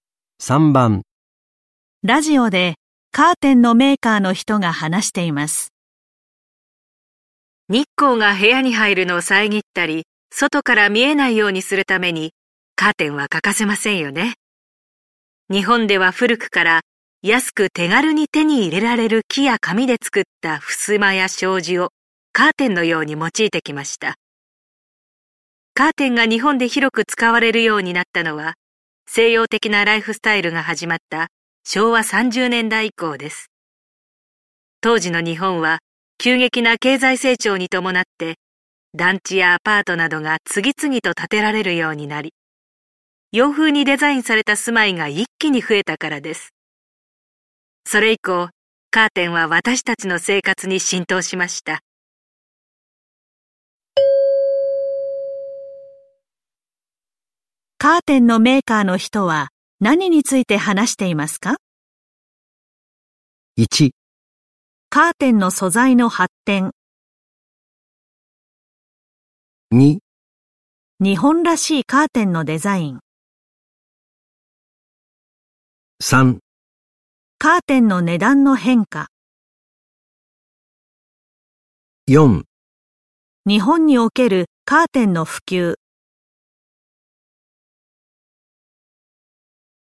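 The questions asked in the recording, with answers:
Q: カーテンのメーカーの人は何について話していますか?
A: 4: 日本におけるカーテンの普及。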